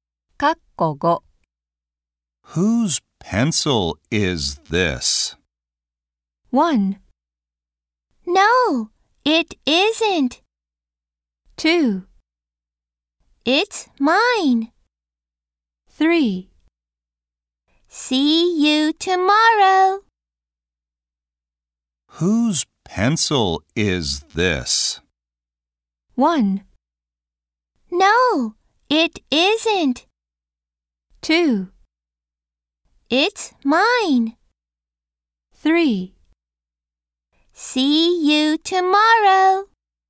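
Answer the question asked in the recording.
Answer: 2: It's mine.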